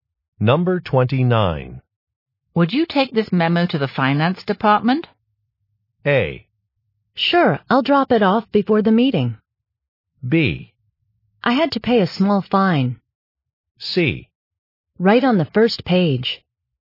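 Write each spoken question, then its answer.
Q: Would you take this memo to the finance department?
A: A: Sure, I'll drop it off before the meeting.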